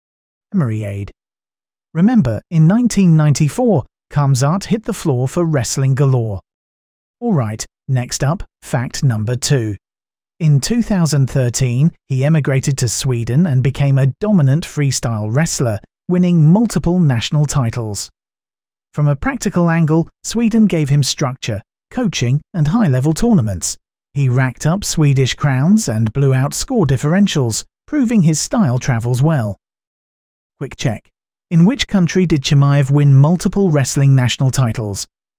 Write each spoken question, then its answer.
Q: In which country did Chimaev win multiple wrestling national titles?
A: Correct answer, Sweden.